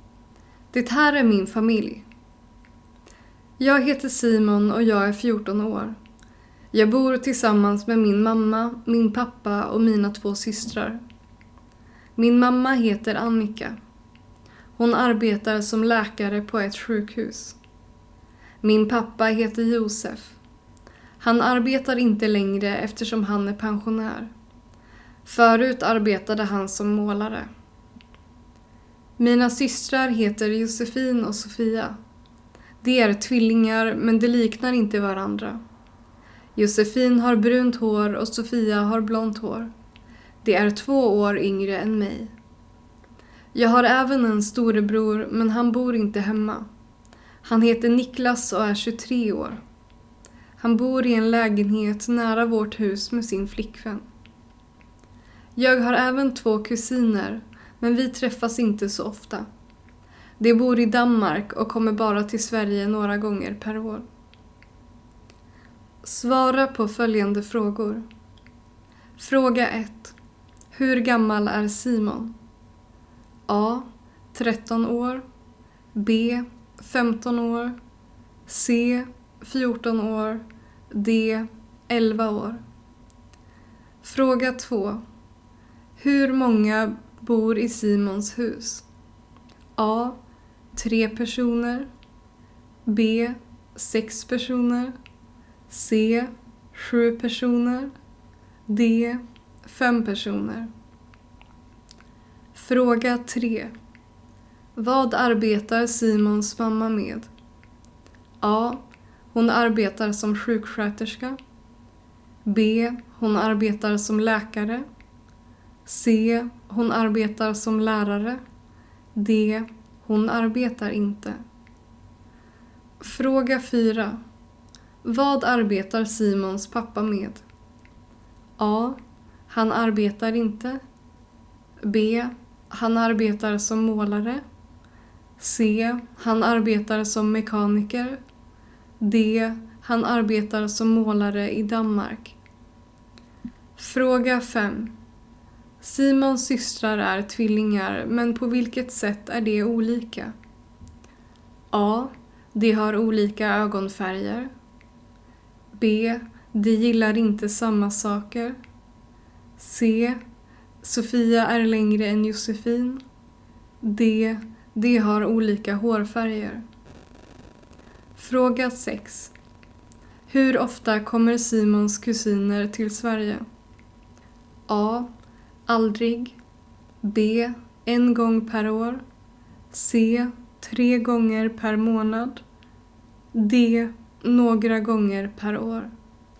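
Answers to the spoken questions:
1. C: 14 år
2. D: 5 personer
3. B: Hon arbetar som läkare
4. A: Han arbetar inte
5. D: De har olika hårfärger
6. D: Några gånger per år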